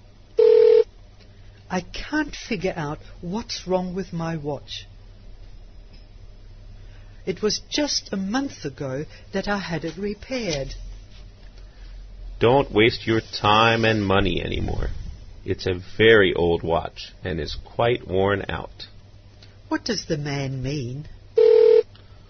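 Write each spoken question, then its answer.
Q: What does the man mean?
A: The watch isn't worth repairing again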